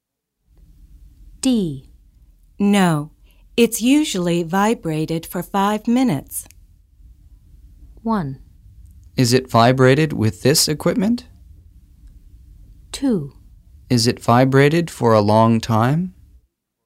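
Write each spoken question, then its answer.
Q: No, it's usually vibrated for 5 minutes.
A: 2: Is it vibrated for a long time?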